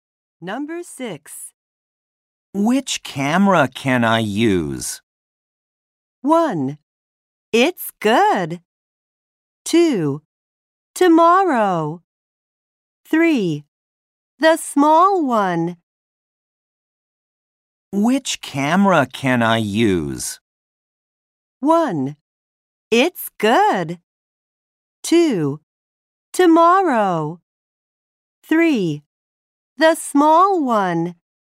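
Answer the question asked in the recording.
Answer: 3: The small one.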